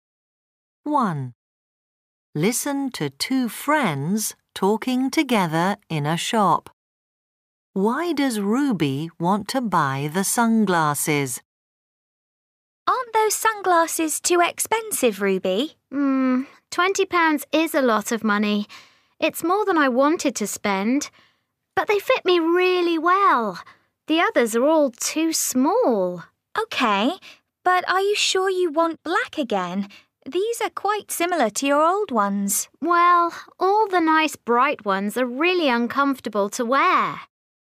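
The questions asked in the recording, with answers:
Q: Why does Ruby want to buy the sunglasses?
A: They fit her really well.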